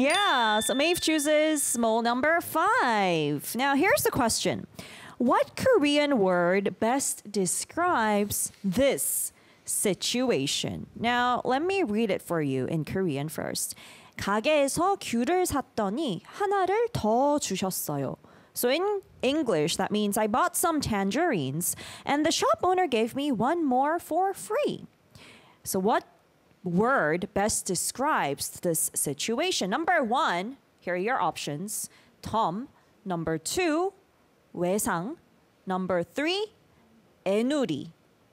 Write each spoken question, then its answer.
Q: What Korean word best describes this situation?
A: So the answer is Tom.